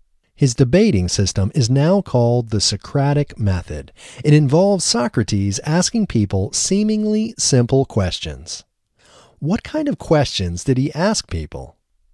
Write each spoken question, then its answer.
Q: What kind of questions did he ask people?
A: He asked people seemingly simple questions.